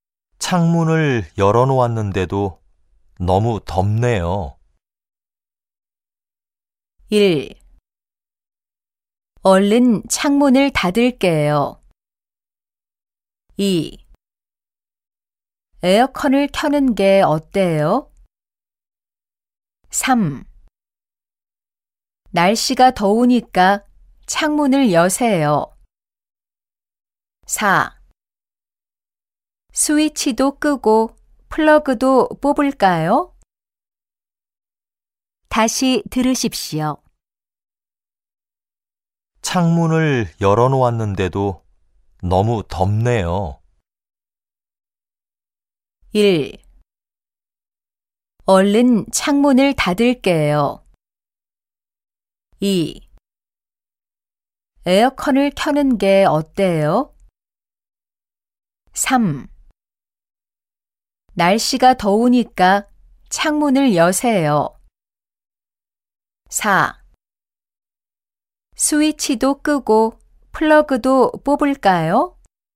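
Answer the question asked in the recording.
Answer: 2: 에어컨을 켜는 게 어때요?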